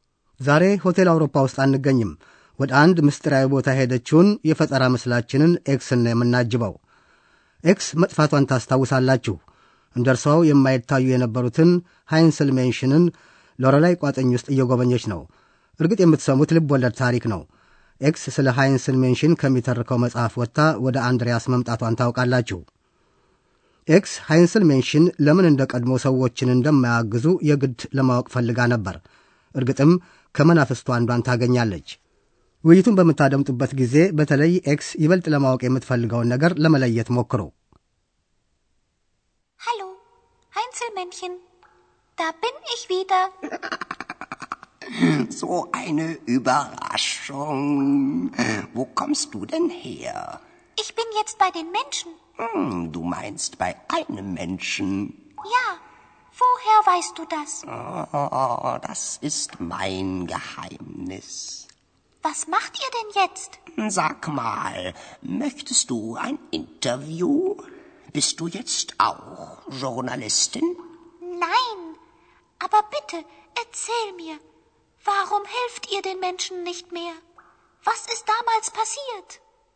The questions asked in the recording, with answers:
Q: ውይይቱን በምታደምጡበት ጊዜ በተለይ ኤክስ ይበልጥ ለማወቅ የምትፈልገውን ነገር ለመለየት ሞክሩ።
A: ኤክስ ይበልጡን ለማወቅ የምትሻው ሃይንስል ሜንሽን ለምን ሰዎችን መርዳት እንዳቆሙ ነው። ያኔ ምን እንደተፈጠረ ለመረዳትም ትፈልጋለች።